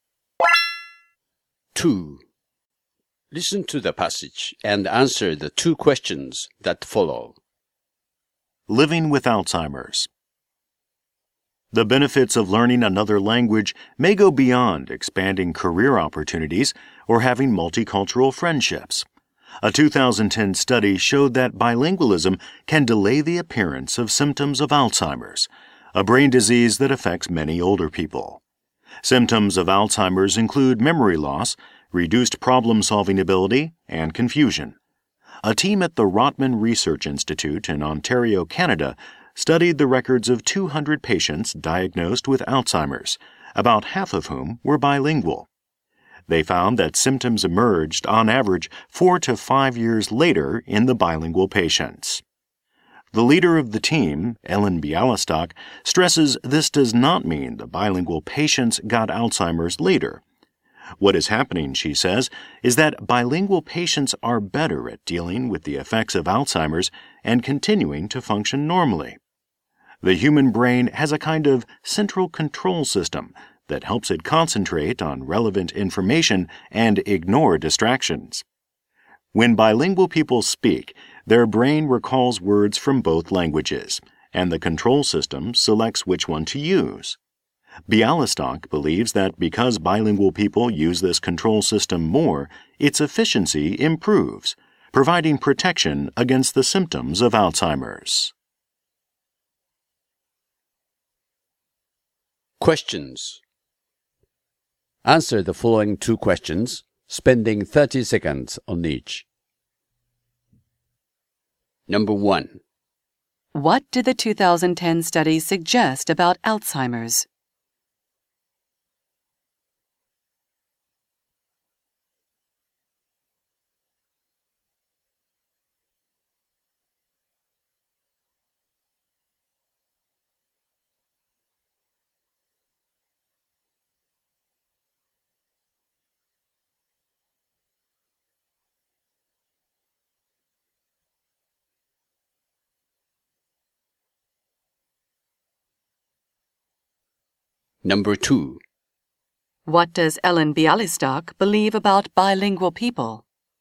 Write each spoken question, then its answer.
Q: What did the 2010 study suggest about Alzheimer's?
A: It states that bilingualism can delay the appearance of symptoms of Alzheimer's.

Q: What does Ellen Bialystok believe about bilingual people?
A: She believes that because bilingual speakers use a special type of language control system, they may be more protected against Alzheimer's disease.